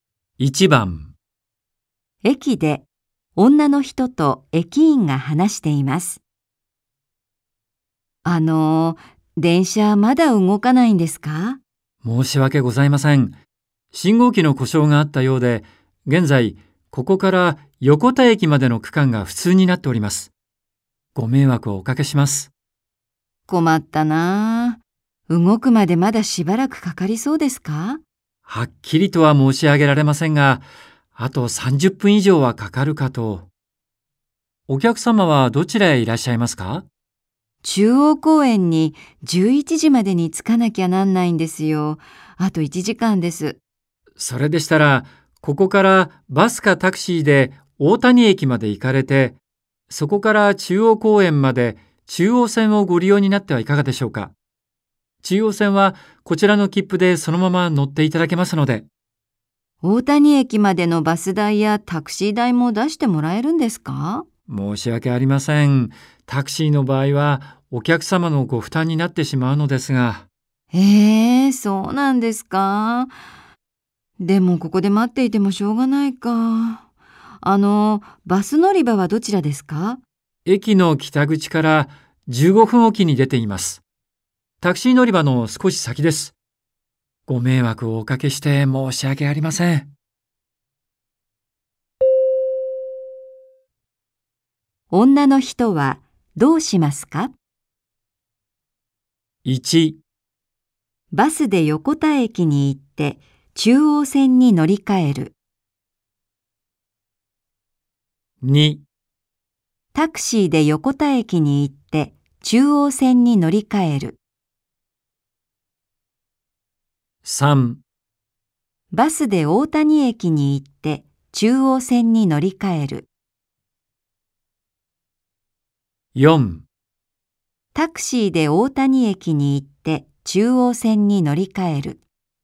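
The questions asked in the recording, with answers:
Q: 女の人はどうしますか?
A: 3: バスで大谷駅に行って中央線に乗り換える。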